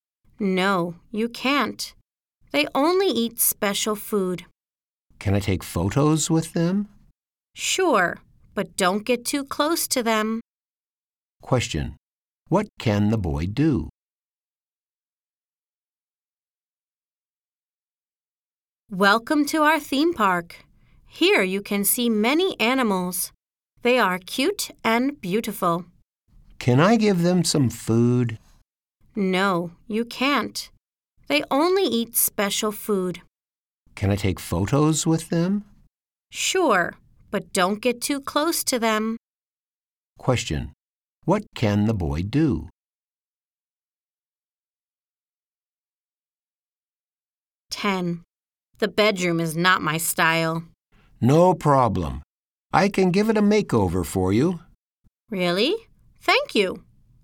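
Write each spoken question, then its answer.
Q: What can the boy do?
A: Take photos with the animals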